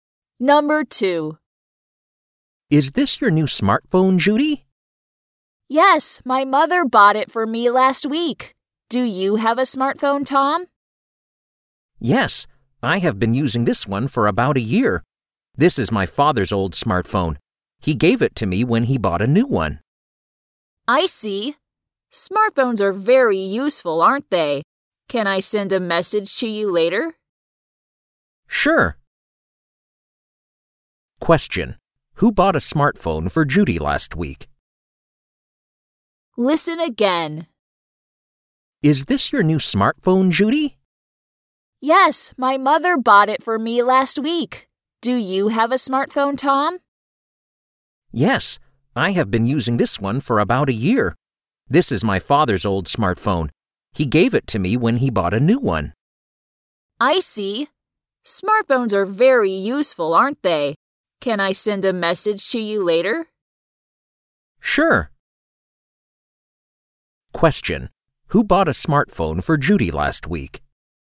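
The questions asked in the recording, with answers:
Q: Who bought a smartphone for Judy last week?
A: Her mother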